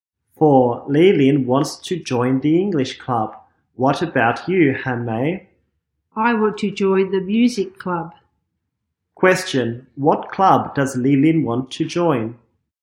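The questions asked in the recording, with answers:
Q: what club does Li Lin want to join?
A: The English club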